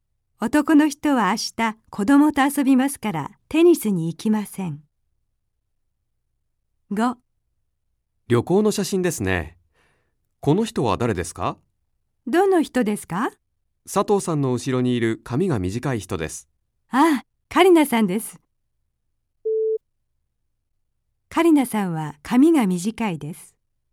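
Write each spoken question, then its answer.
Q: カリナさんは髪が短いです。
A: ○(正しい)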